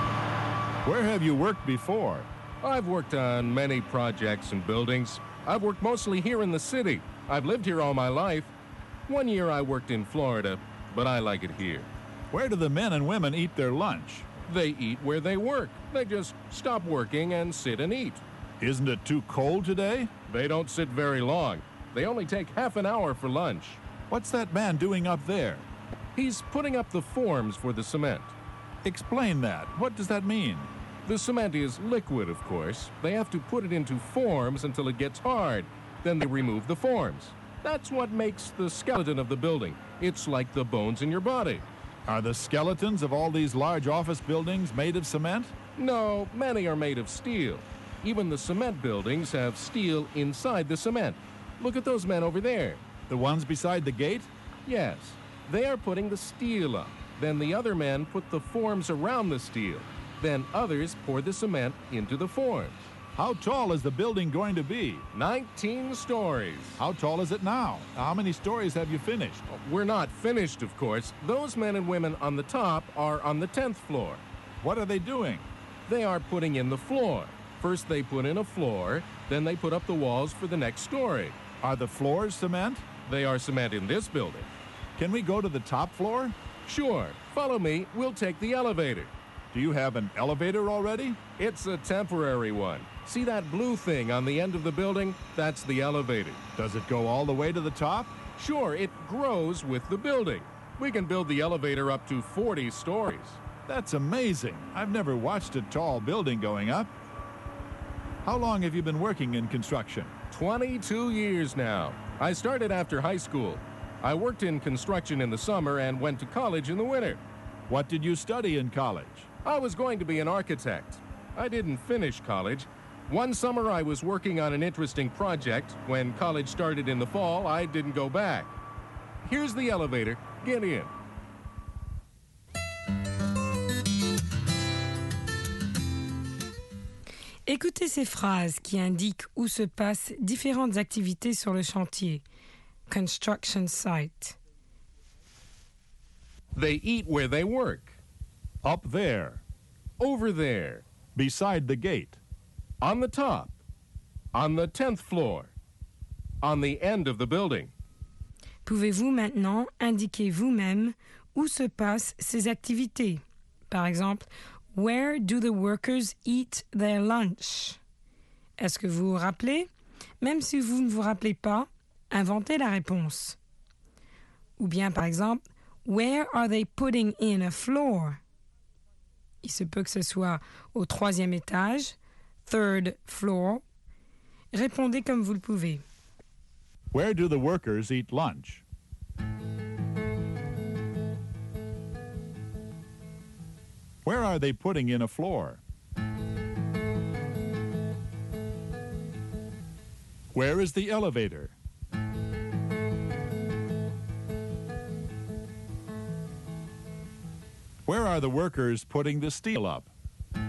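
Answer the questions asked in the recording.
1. Where they work
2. On the top, on the 10th floor
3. On the end of the building
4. Over there, beside the gate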